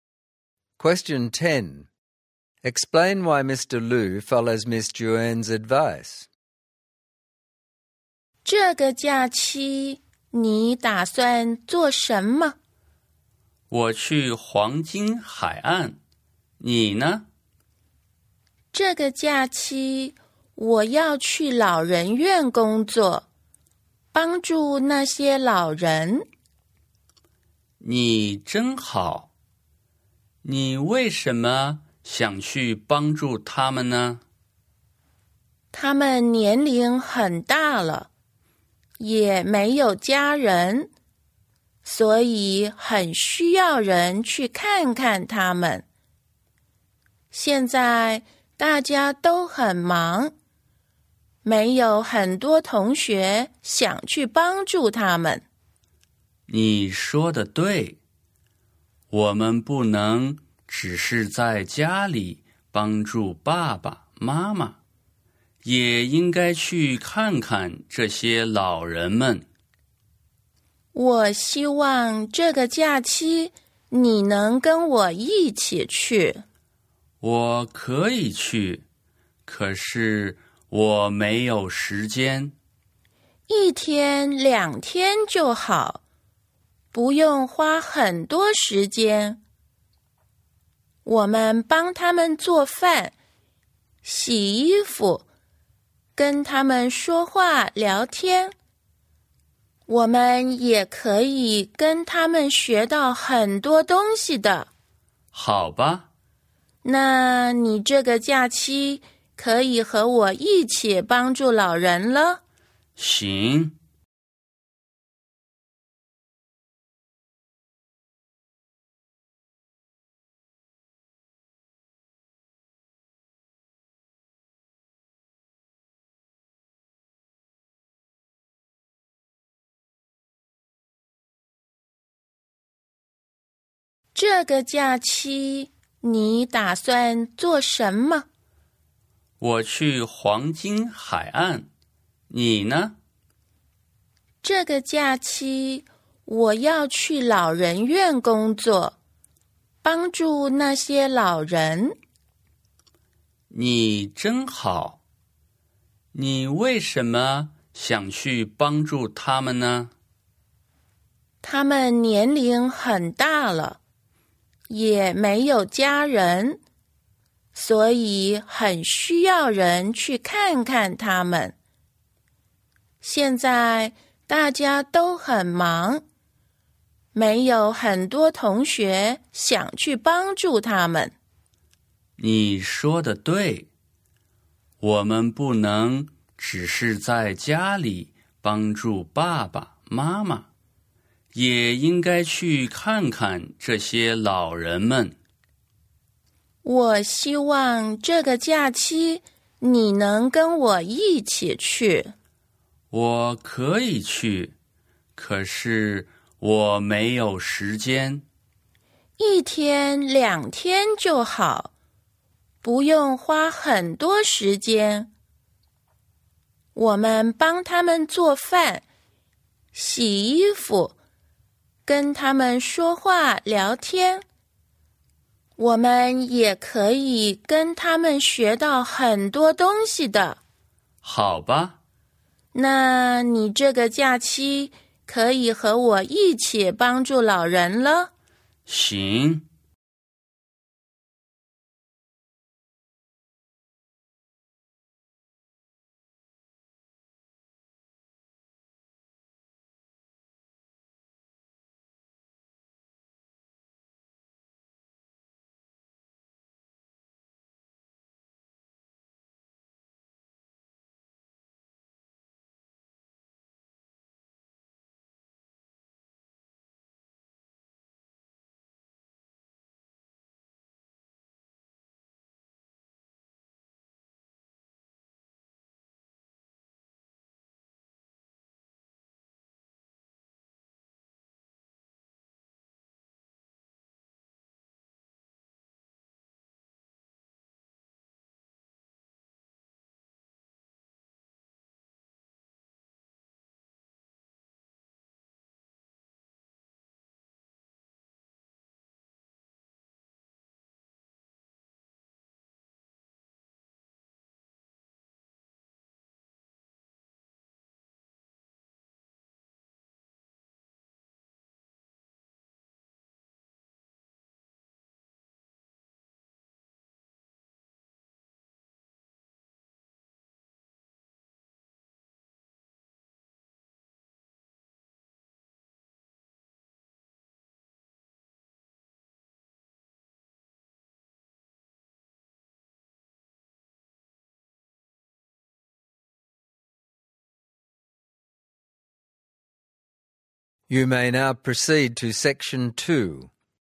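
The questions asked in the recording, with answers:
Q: Explain why Mr. Liu follows Miss Juan's advice.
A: The elderly have no family and need visitors, it only takes a day or two, and they can also learn a lot from the old people.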